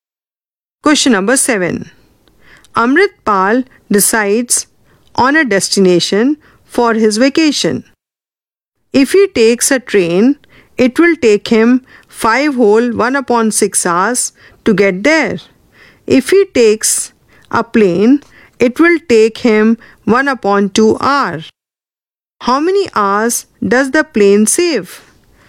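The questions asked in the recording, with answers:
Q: How many hours does the plane save?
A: 4 2/3 hours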